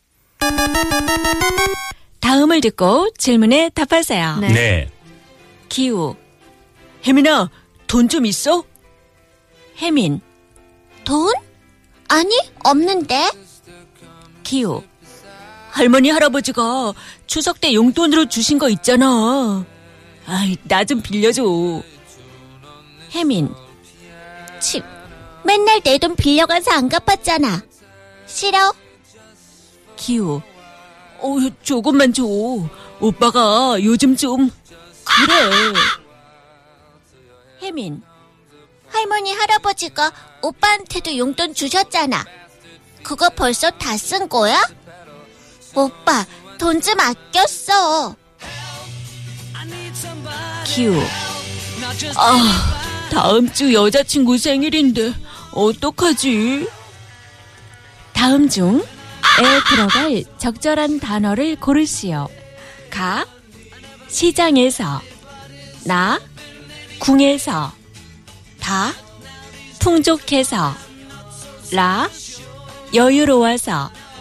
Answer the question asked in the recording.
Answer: Na, 오빠가 요즘 궁해서 그래.